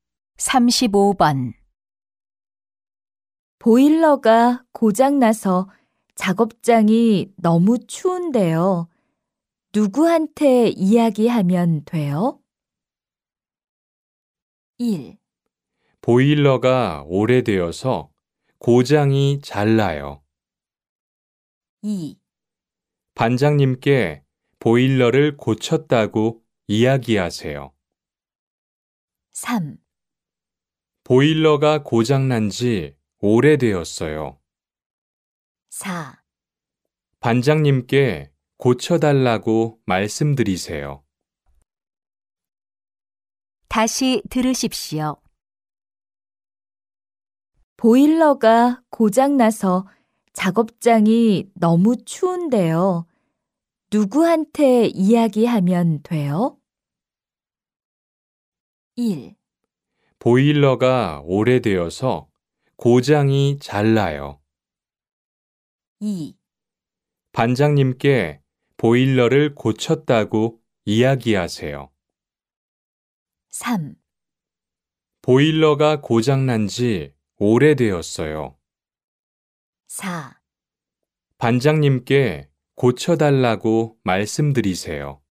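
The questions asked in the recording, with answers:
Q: 보일러가 고장나서 작업장이 너무 추운데요. 누구한테 이야기하면 돼요?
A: 4: 반장님께 고쳐달라고 말씀드리세요.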